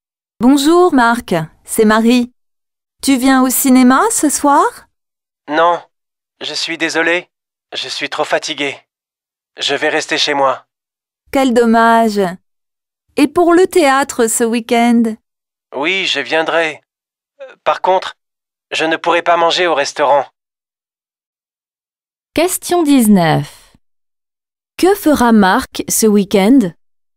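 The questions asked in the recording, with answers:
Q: Que fera Marc ce week-end?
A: Il ira au théâtre (mais ne mangera pas au restaurant).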